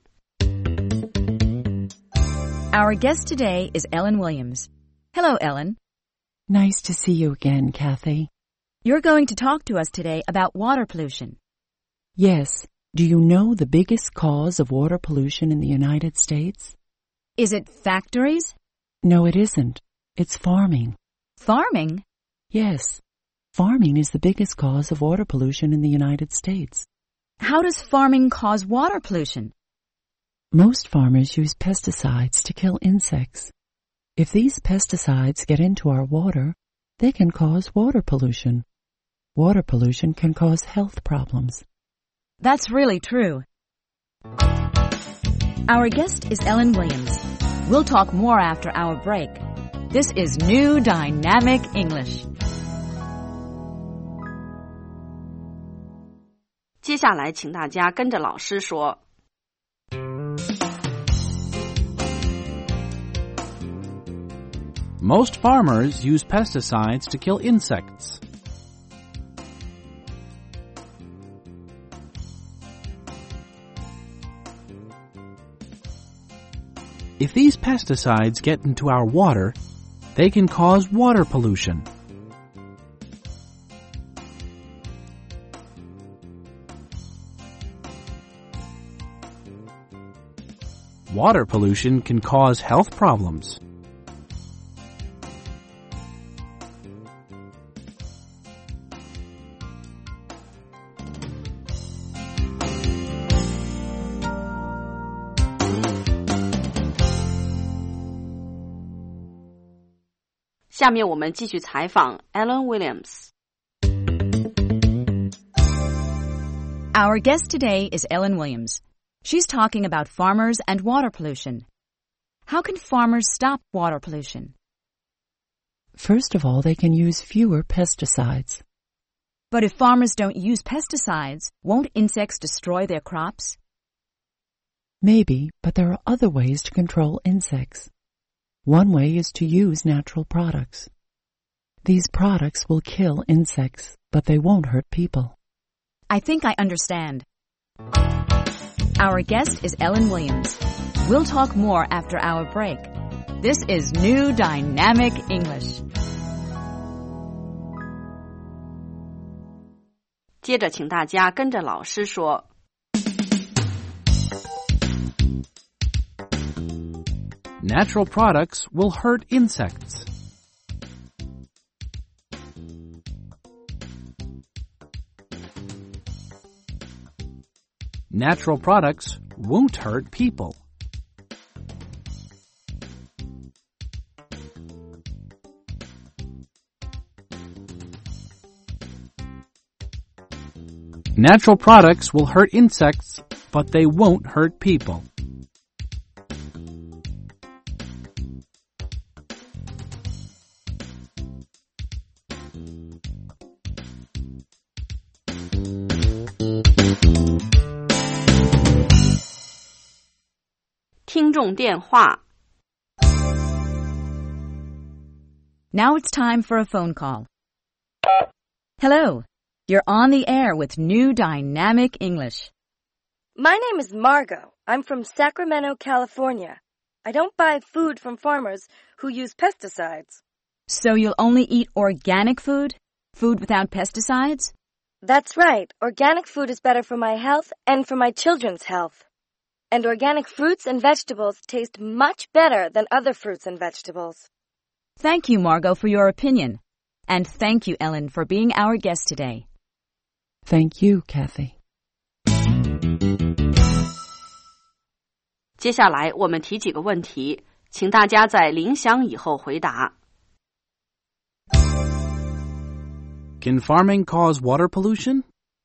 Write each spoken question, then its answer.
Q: Can farming cause water pollution?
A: Yes, it can. Farmers use pesticides, which can cause water pollution.